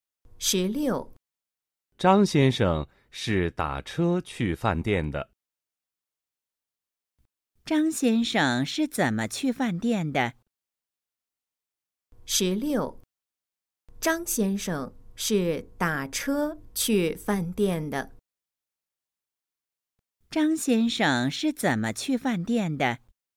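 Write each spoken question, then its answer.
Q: 张先生是怎么去饭店的?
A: 打车去的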